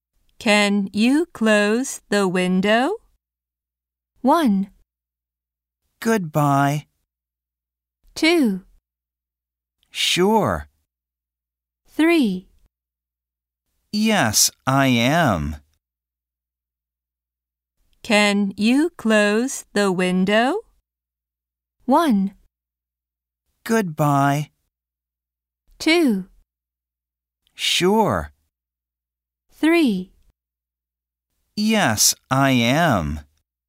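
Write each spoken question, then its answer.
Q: Can you close the window?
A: 2: Sure.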